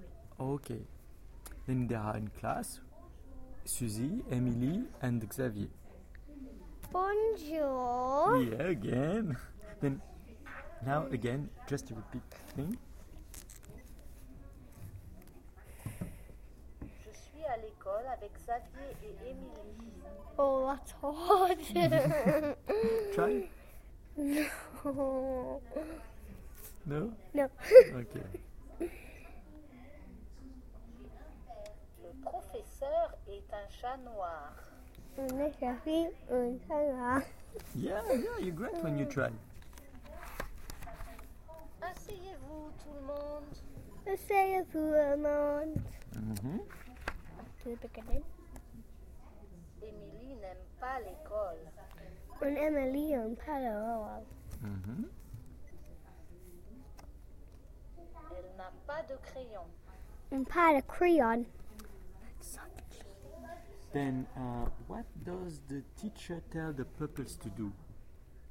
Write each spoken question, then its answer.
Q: Then, what does the teacher tell the pupils to do?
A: No, he said, asseyez-vous, do you remember?